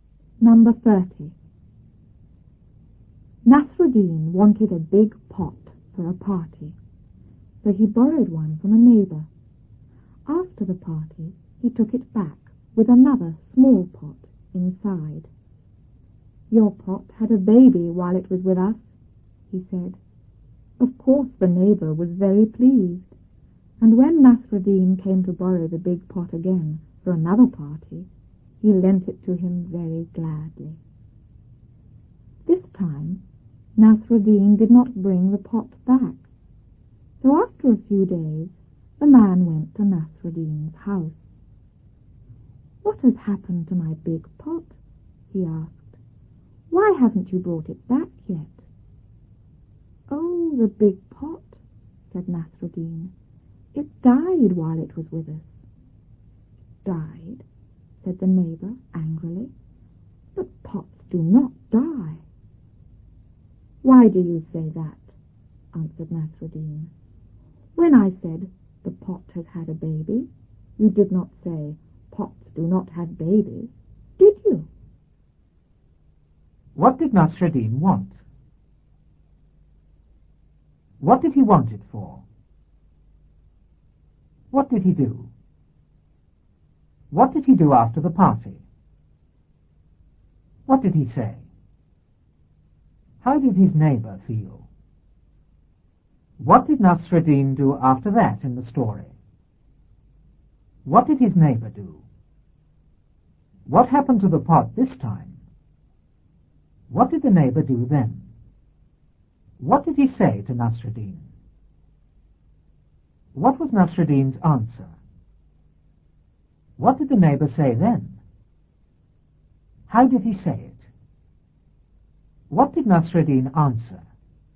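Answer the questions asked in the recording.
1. A big pot
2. For a party
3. He borrowed one from a neighbour
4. He took it back with a small pot inside
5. Your pot had a baby while it was with us
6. Very pleased
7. He came to borrow the big pot again for another party
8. He lent it to him very gladly
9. Nasruddin did not bring it back
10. He went to Nasruddin's house
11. What has happened to my big pot? Why haven't you brought it back yet?
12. It died while it was with us
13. Died? But pots do not die
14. Angrily
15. When I said the pot had a baby, you did not say pots do not have babies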